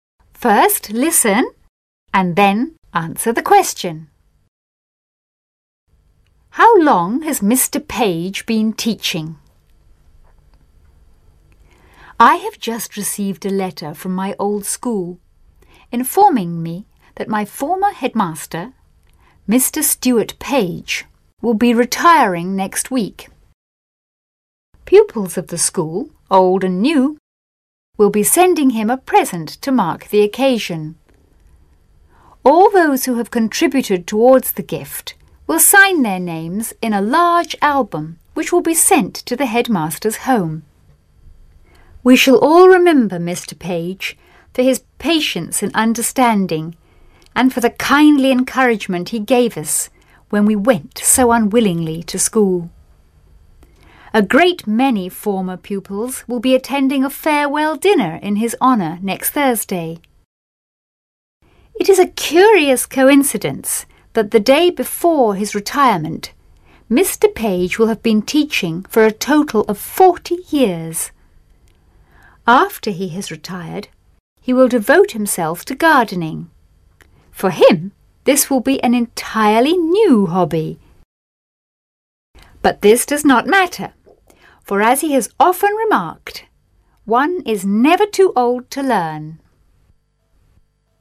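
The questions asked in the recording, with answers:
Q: How long has Mr. Page been teaching?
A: For (almost) 40 years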